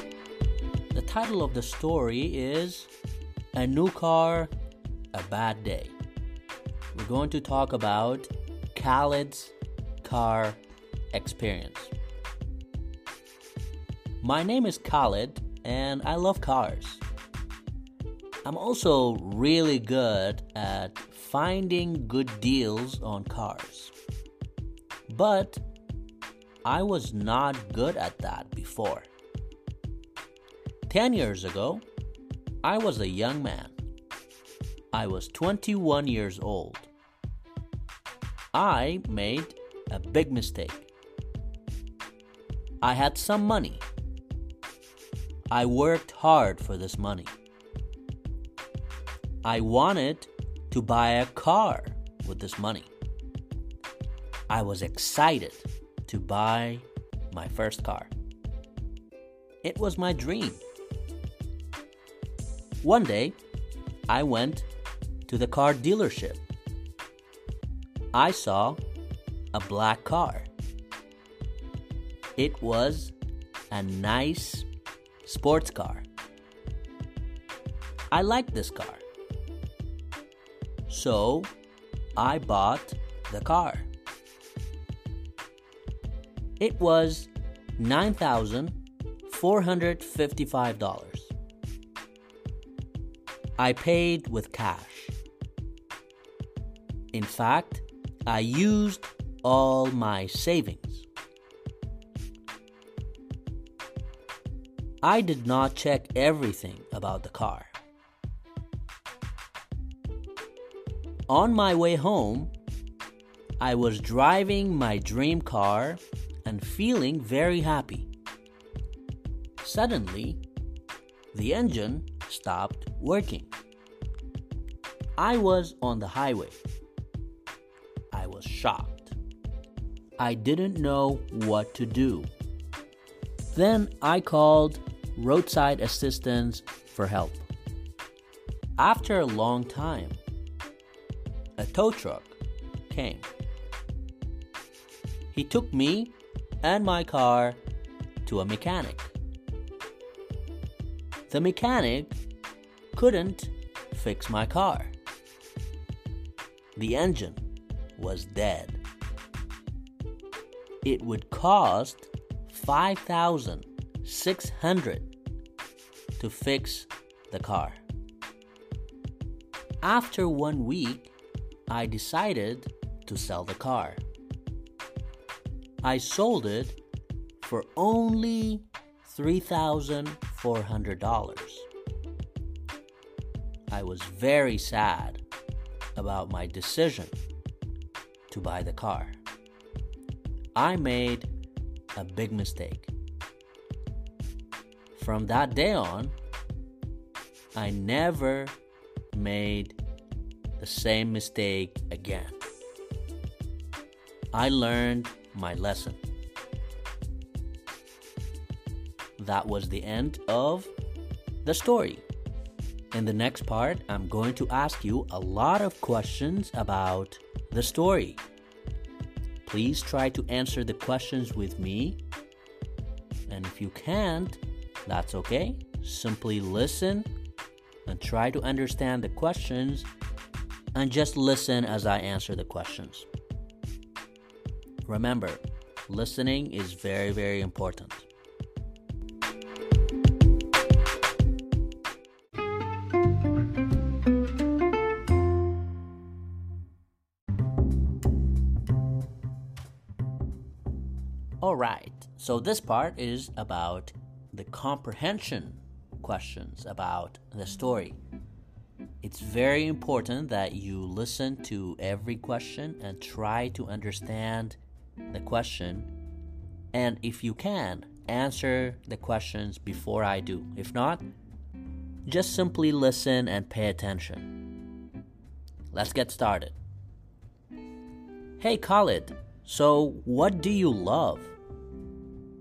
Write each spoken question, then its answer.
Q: Hey Khalid, so what do you love?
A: I love cars. I really love them.